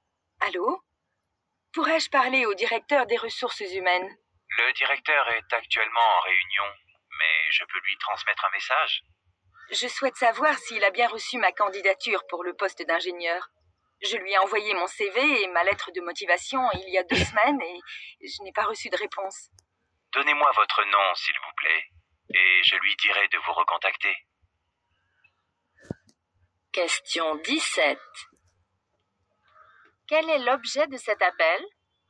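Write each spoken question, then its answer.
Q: Quel est l'objet de cet appel ?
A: Savoir si le directeur a bien reçu sa candidature pour le poste d'ingénieur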